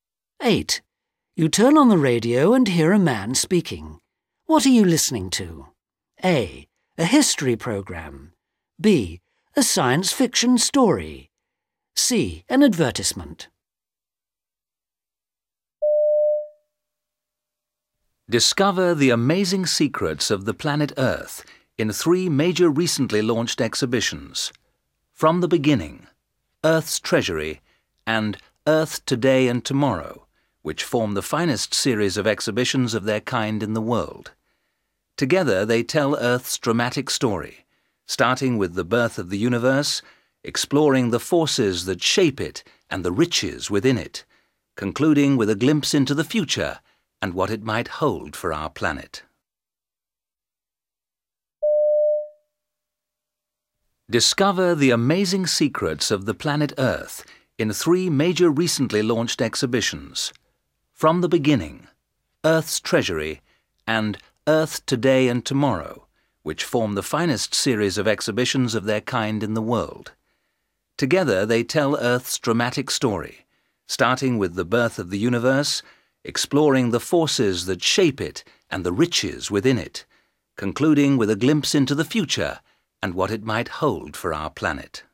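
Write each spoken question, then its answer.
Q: What are you listening to?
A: C: An advertisement.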